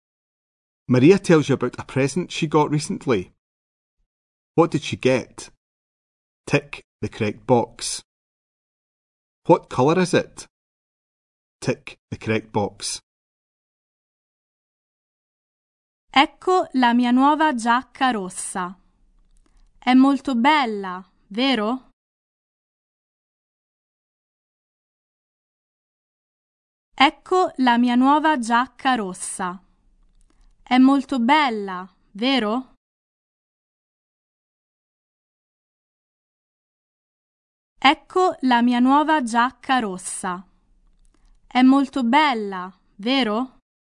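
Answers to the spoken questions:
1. A jacket
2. Red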